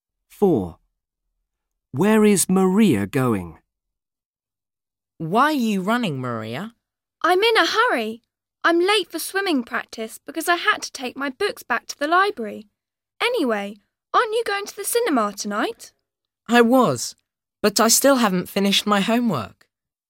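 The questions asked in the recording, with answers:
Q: Where is Maria going?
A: To swimming practice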